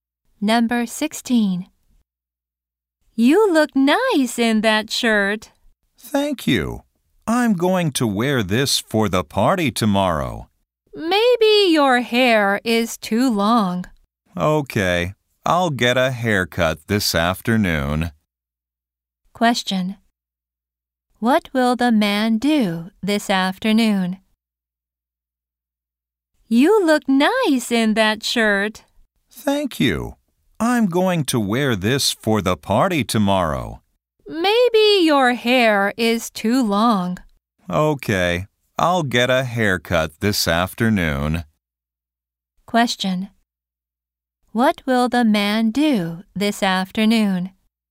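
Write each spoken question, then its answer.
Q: Question. What will the man do this afternoon?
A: Get a haircut.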